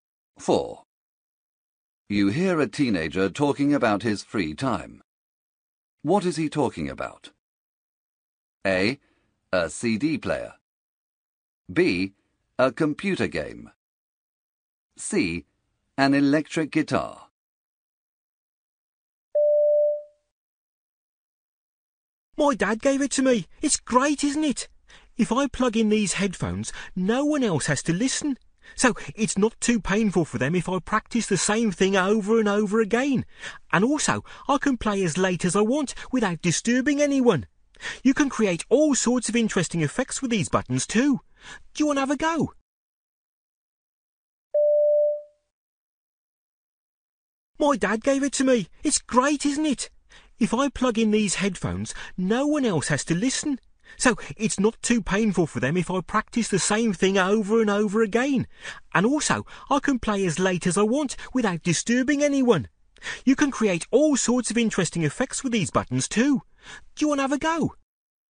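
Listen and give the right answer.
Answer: C: An electric guitar.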